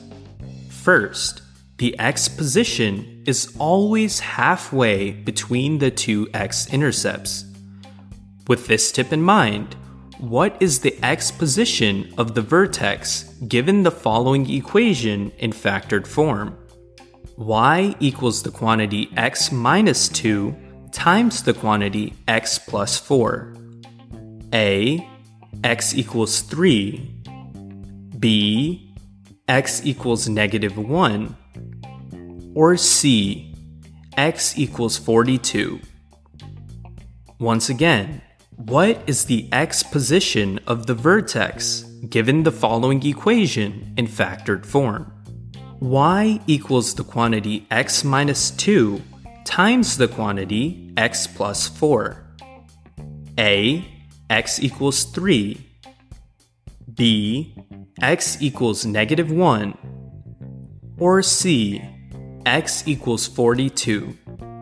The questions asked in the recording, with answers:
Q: With this tip in mind, what is the x position of the vertex given the following equation in factored form?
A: the better answer for the X position for the vertex is answer choice B, x equals negative 1